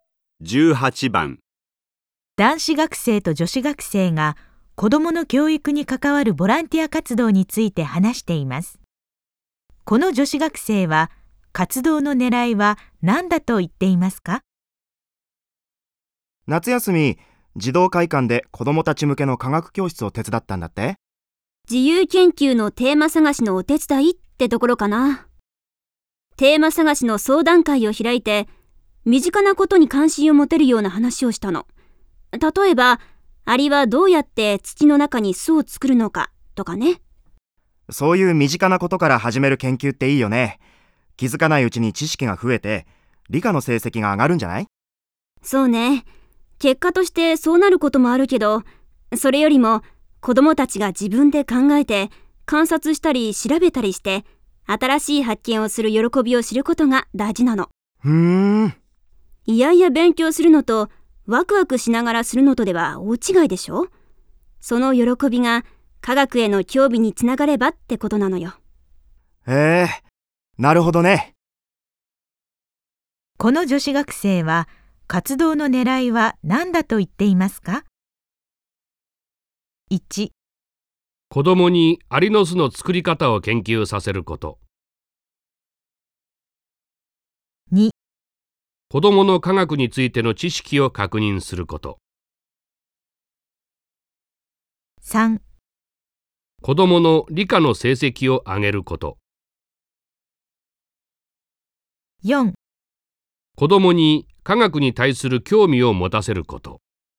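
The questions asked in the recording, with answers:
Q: この女子学生は活動の狙いは何だと言っていますか?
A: 4: 子供に科学に対する興味を持たせること。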